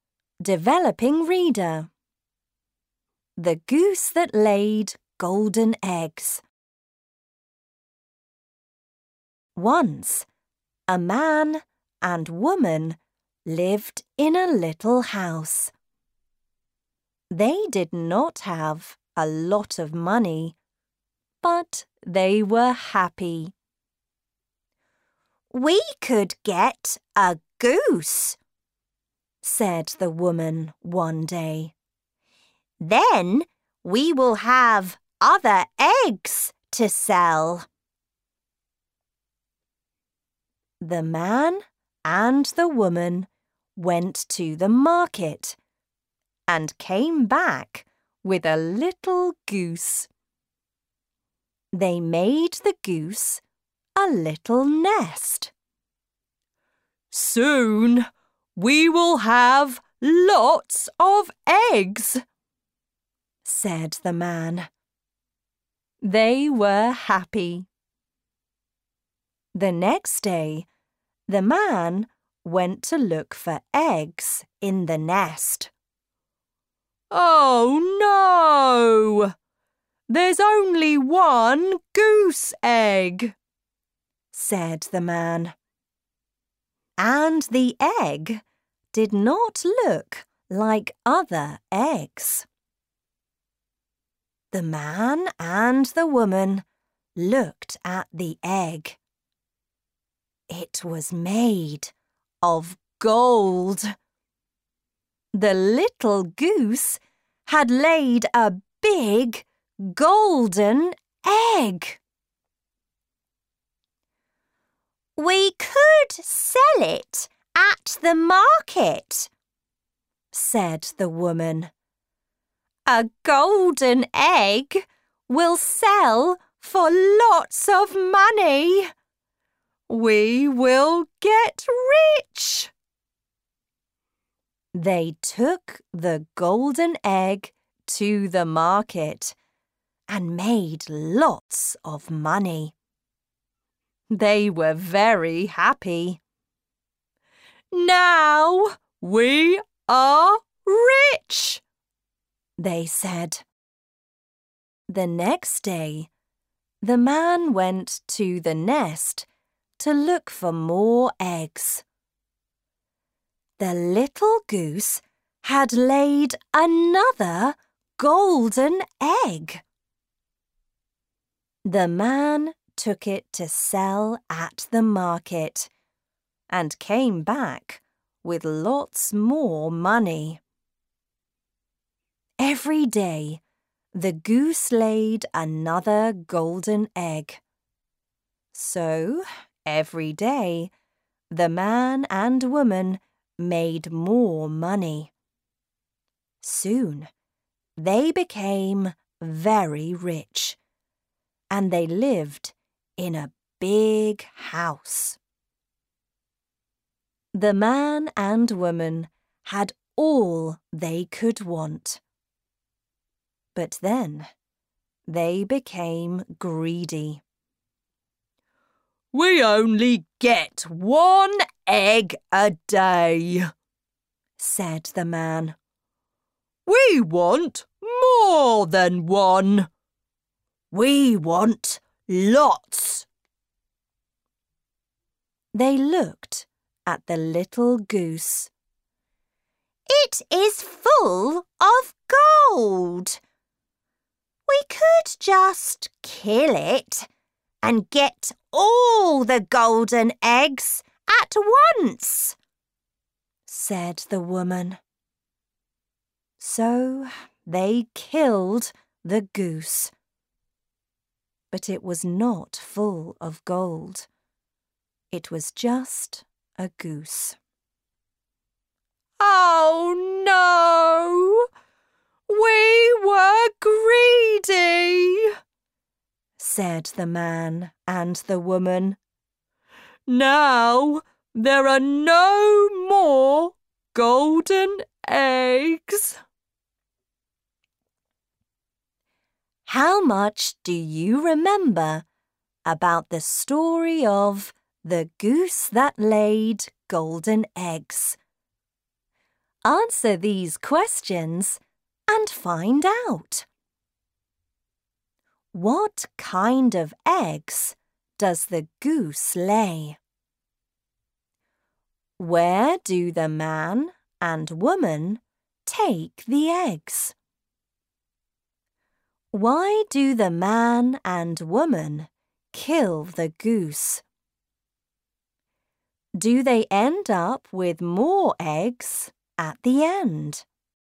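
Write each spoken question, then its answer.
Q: What kind of eggs does the goose lay?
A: Golden eggs

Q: Where do the man and woman take the eggs?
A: To the market

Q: Why do the man and woman kill the goose?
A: They were greedy and wanted all the golden eggs at once

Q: Do they end up with more eggs at the end?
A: No, there are no more golden eggs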